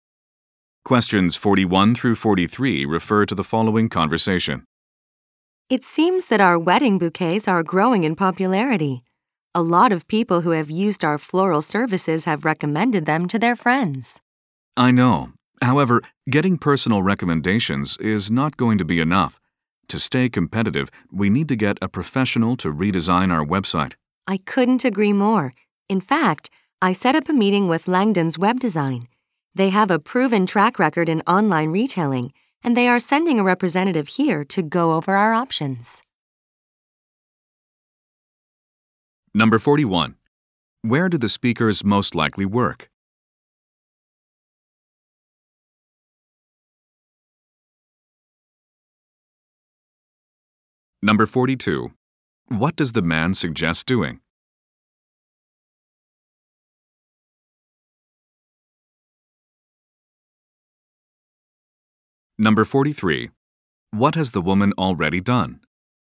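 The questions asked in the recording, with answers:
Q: Where do the speakers most likely work?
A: At a flower shop

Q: What does the man suggest doing?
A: Having the website redesigned by a professional

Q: What has the woman already done?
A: Set up a meeting with a web design company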